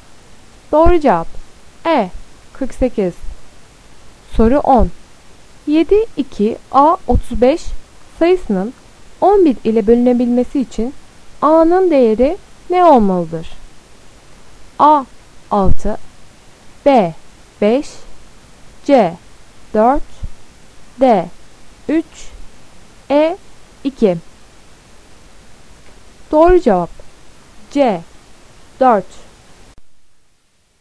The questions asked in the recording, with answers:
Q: 7, 2, A 35 sayısının 11 ile bölünebilmesi için A'nın değeri ne olmalıdır?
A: Doğru cevap C 4.